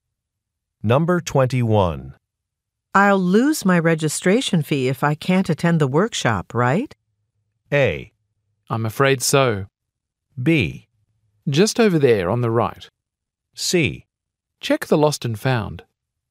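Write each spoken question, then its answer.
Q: I'll lose my registration fee if I can't attend the workshop, right?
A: A: I'm afraid so.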